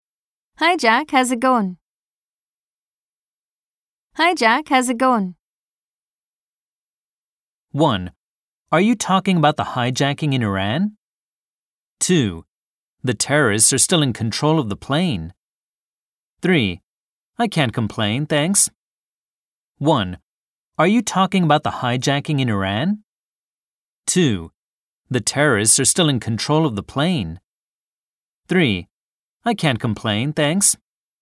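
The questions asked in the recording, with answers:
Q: Hi Jack, how's it going?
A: 3: I can't complain, thanks.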